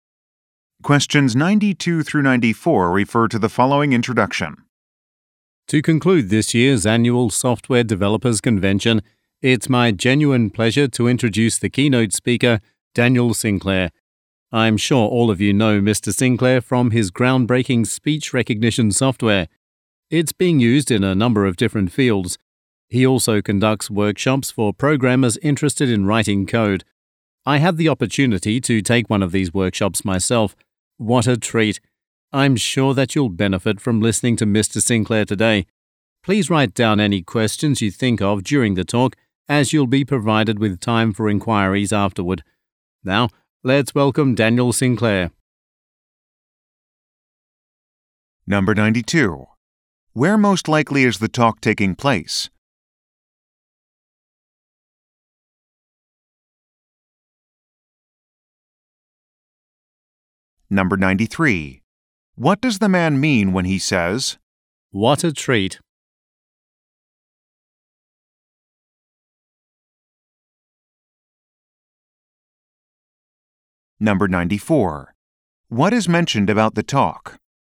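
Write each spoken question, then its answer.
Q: Where most likely is the talk taking place?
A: At a software developers convention

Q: What is mentioned about the talk?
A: There will be time for questions afterward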